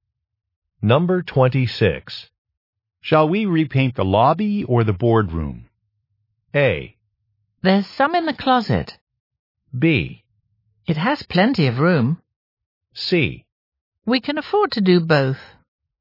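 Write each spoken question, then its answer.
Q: Shall we repaint the lobby or the boardroom?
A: C: We can afford to do both.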